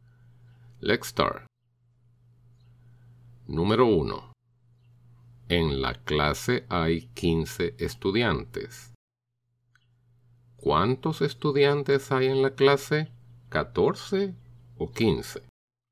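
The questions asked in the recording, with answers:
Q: ¿Cuántos estudiantes hay en la clase?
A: Hay 15 estudiantes en la clase.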